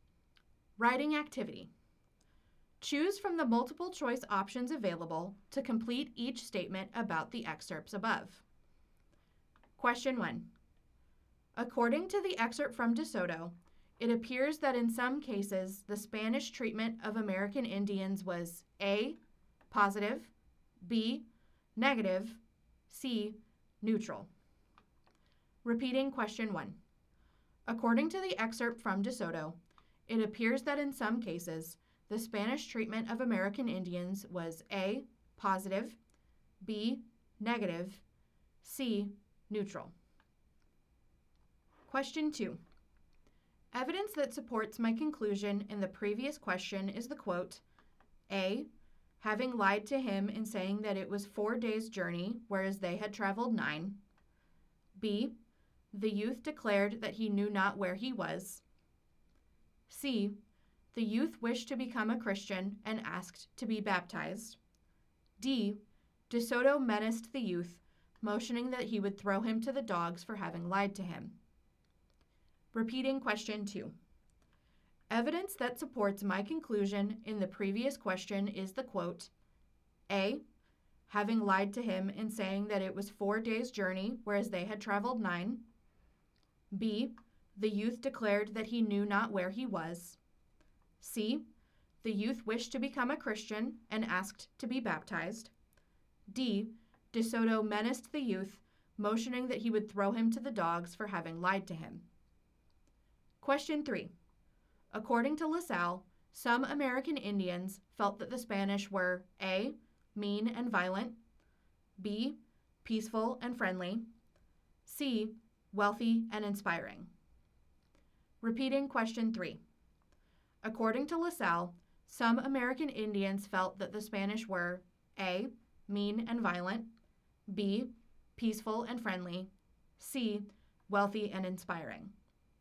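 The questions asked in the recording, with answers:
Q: According to the excerpt from DeSoto, it appears that in some cases the Spanish treatment of American Indians was A, positive, B, negative, C, neutral.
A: B: negative

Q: Evidence that supports my conclusion in the previous question is the quote, A, having lied to him in saying that it was 4 days' journey, whereas they had traveled 9.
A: D: De Soto menaced the youth, motioning that he would throw him to the dogs for having lied to him.

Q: According to LaSalle, some American Indians felt that the Spanish were A, mean and violent, B, peaceful and friendly, C, wealthy and inspiring.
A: A: mean and violent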